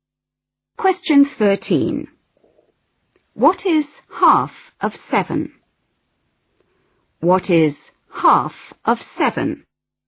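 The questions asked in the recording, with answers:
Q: What is half of 7?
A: 3.5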